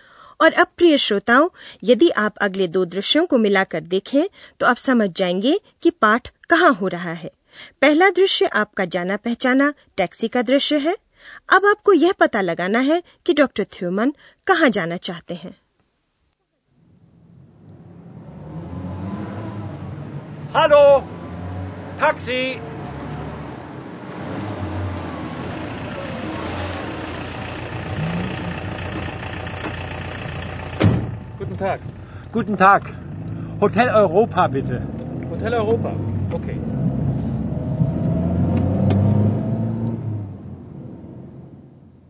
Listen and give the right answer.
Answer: तो doctor थ्योमन hotel Europe hotel Europa जाना चाहते हैं